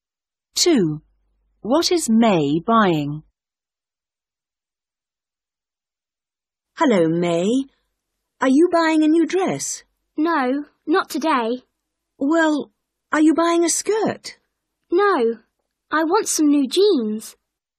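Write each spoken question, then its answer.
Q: What is May buying?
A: jeans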